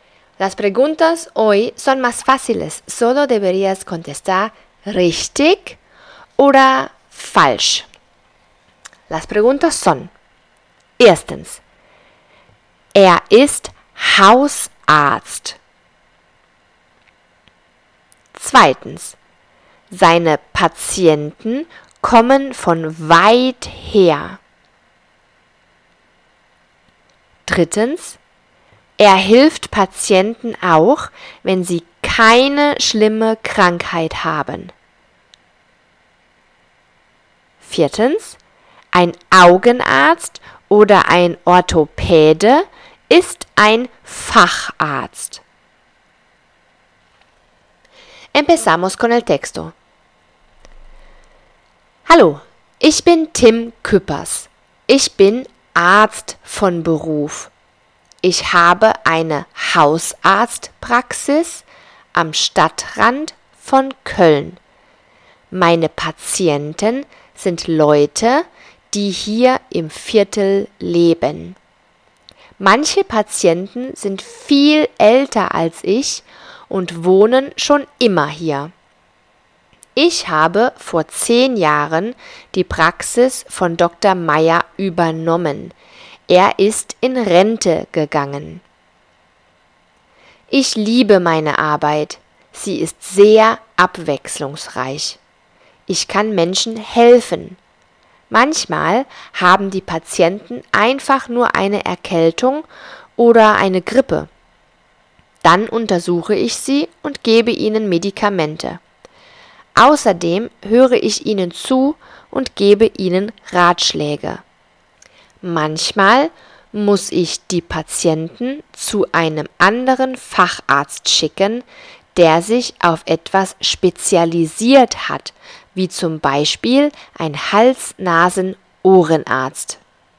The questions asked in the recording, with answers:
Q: er ist Hausarzt.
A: Das ist richtig.

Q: seine Patienten kommen von weit her.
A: Das ist falsch. Die Patienten leben im Viertel in El Barrio.

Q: er hilft Patienten auch, wenn sie keine schlimme Krankheit haben.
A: Das ist richtig.